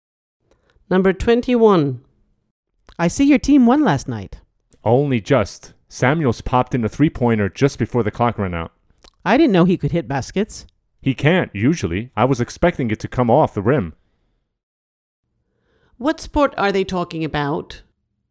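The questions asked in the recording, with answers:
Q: What sport are they talking about?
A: Basketball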